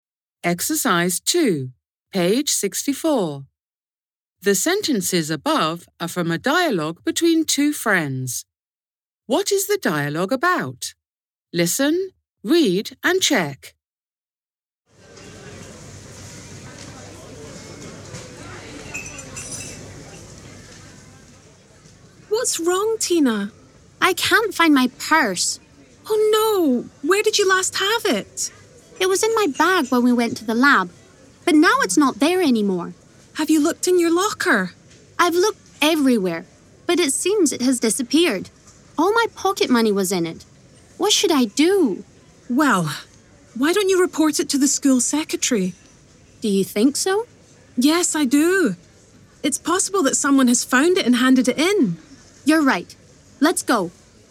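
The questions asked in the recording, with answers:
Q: What is the dialogue about?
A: Tina can't find her purse (she has lost it, with all her pocket money)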